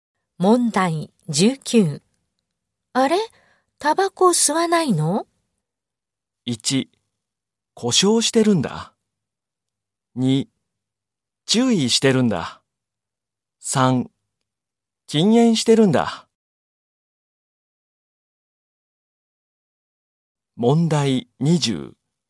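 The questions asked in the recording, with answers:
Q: あれ?タバコ吸わないの?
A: 1: 禁煙してるんだ。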